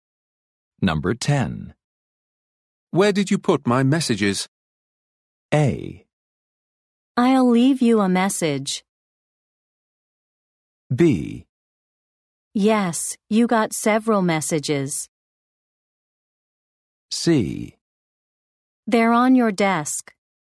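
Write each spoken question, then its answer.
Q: Where did you put my messages?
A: C: They're on your desk.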